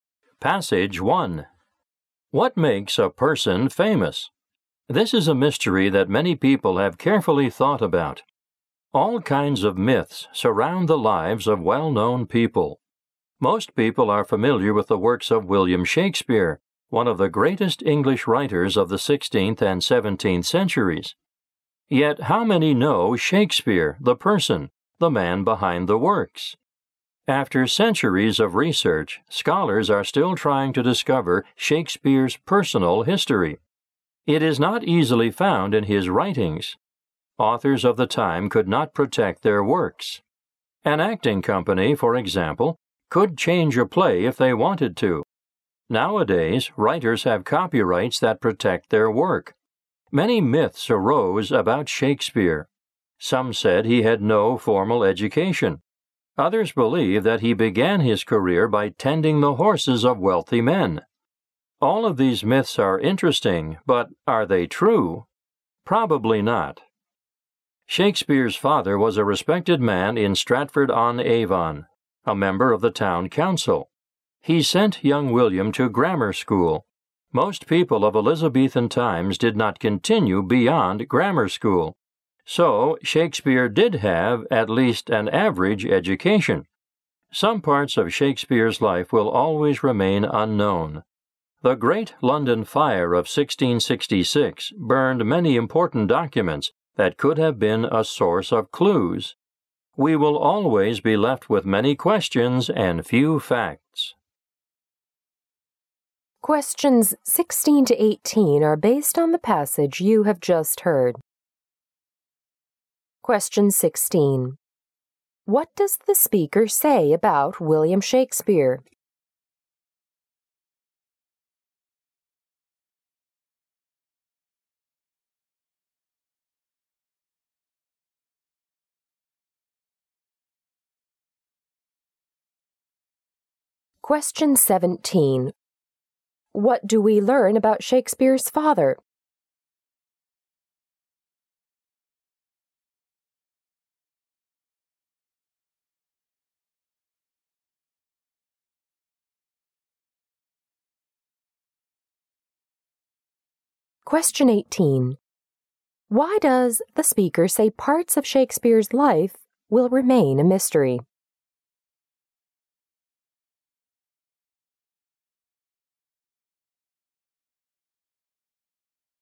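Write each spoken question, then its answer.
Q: What does the speaker say about William Shakespeare?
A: Little is known about his personal life.

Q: What do we learn about Shakespeare's father?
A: He was a respected man and a member of the town council.

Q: Why does the speaker say parts of Shakespeare's life will remain a mystery?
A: Many important documents were burned in the Great London Fire of 1666.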